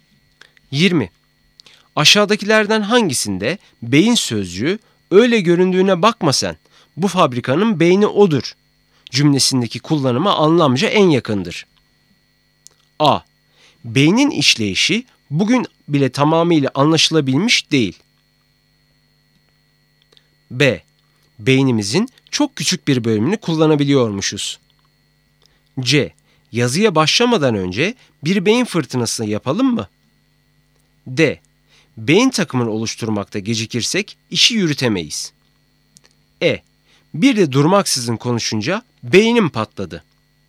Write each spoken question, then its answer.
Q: Aşağıdakilerden hangisinde beyin sözcüğü öyle göründüğüne bakma sen, bu fabrikanın beyni odur cümlesindeki kullanıma anlamca en yakındır?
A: Doğru cevap D.